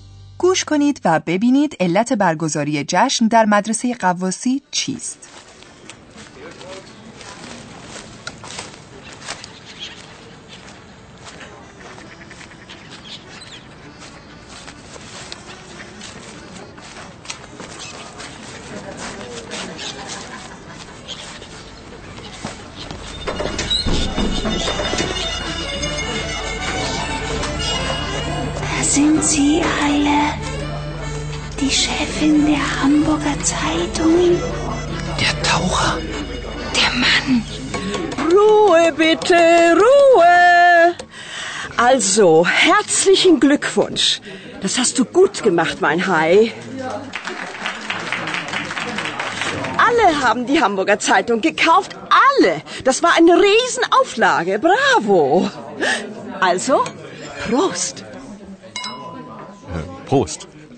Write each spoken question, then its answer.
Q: گوش کنید و ببینید علت برگزاری جشن در مدرسه قواسی چیست.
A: این یک کلاهبرداری است و حاضرین به خاطر موفقیت آن جشن گرفتند.